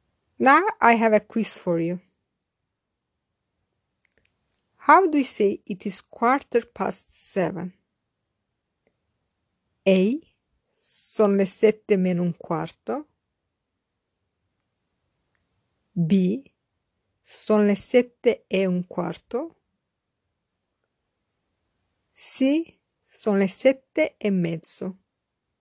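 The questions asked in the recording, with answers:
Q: How do you say it is quarter past seven?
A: B: Sono le 7 e un quarto.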